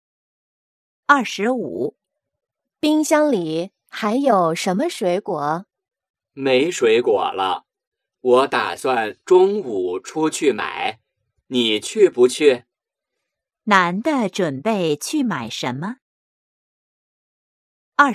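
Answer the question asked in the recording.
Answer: 水果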